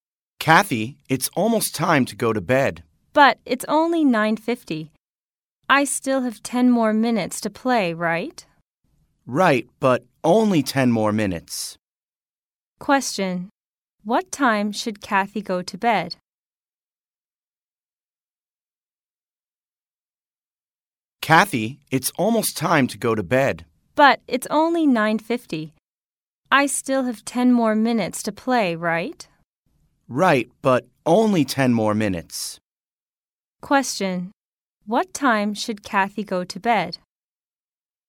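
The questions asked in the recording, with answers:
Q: What time should Kathy go to bed?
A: At 10:00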